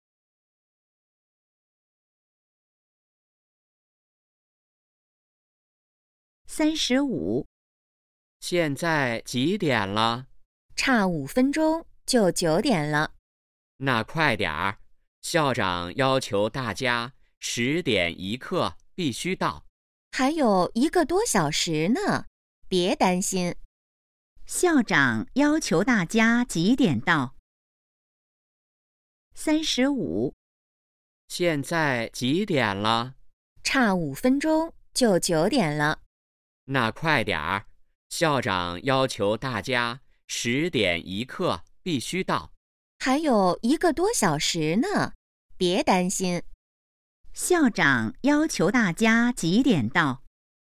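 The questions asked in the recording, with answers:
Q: 校长要求大家几点到?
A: 10点1刻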